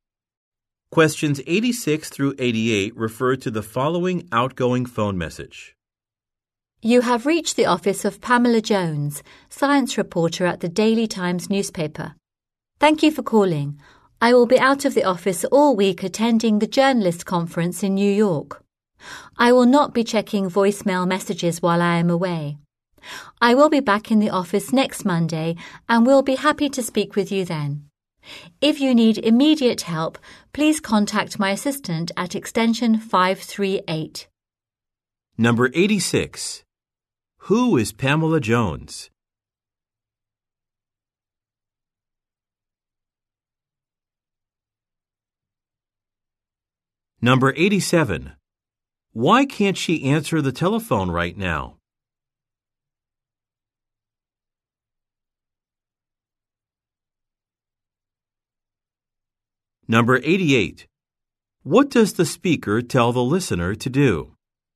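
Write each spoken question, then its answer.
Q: Who is Pamela Jones?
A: A science reporter

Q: Why can't she answer the telephone right now?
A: She is at a conference in New York

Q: What does the speaker tell the listener to do?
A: Contact her assistant for immediate help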